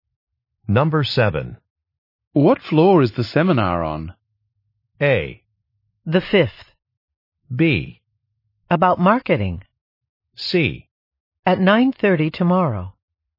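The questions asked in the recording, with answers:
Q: What floor is the seminar on?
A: A: The 5th.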